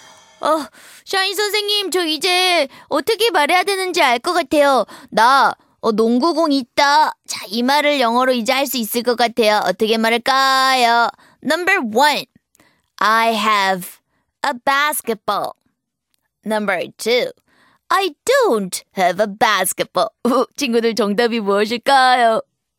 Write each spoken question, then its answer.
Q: 나 농구공 있다. 자, 이 말을 영어로 이제 할 수 있을 것 같아요. 어떻게 말할까요?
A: 바로 I have a basketball 정답 1번이네요